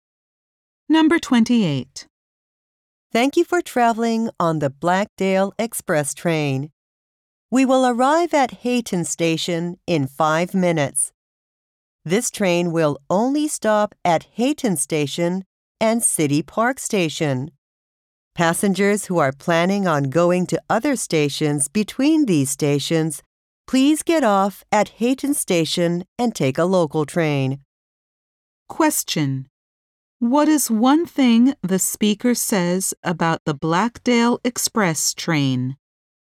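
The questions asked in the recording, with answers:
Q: What is one thing the speaker says about the Blackdale Express train?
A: It only stops at Hayton Station and City Park Station.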